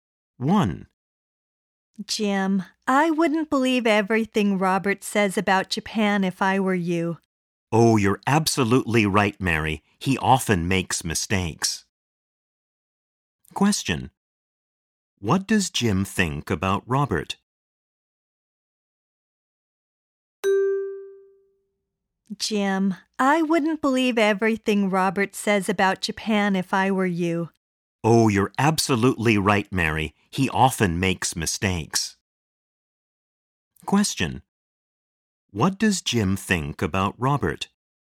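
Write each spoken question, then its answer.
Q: What does Jim think about Robert?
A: He often makes mistakes about Japan, so you shouldn't believe everything he says.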